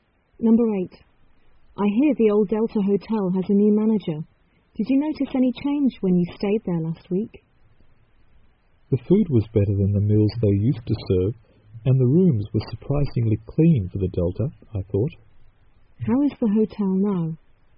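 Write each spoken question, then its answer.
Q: How is the hotel now?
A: Better: better food and cleaner rooms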